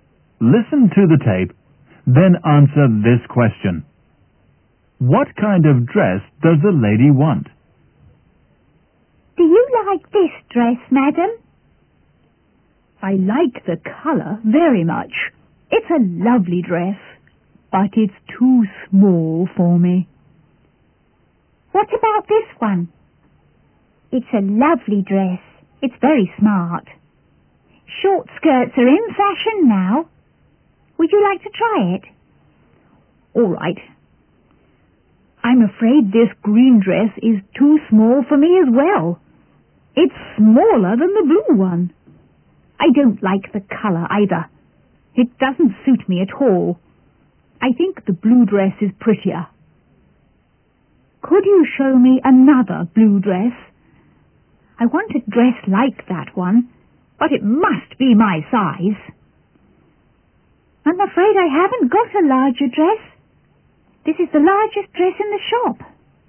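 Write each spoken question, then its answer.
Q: What kind of dress does the lady want?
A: A blue dress like the first one, but in her size (larger)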